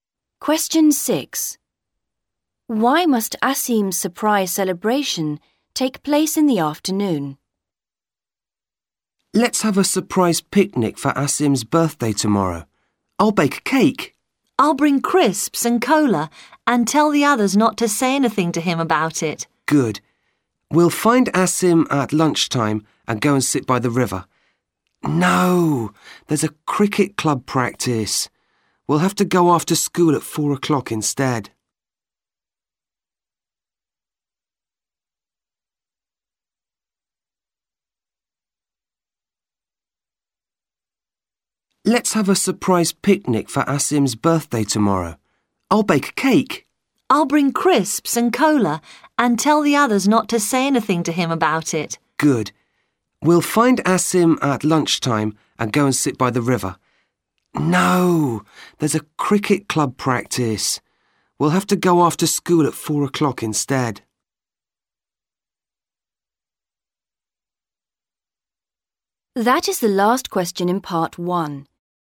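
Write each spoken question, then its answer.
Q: Why must Asim's surprise celebration take place in the afternoon?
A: There is a cricket club practice at lunchtime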